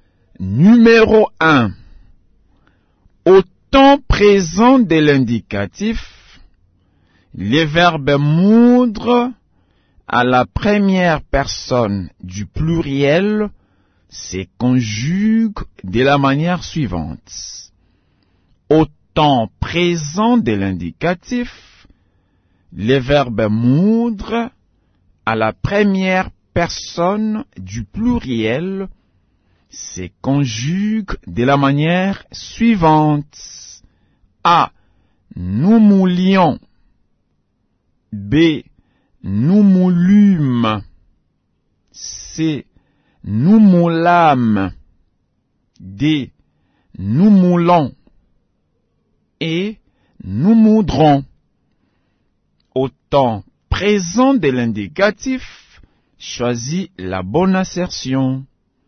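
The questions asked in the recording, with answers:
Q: Au temps présent de l'indicatif, le verbe moudre à la première personne du pluriel se conjugue de la manière suivante.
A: D: Nous moulons.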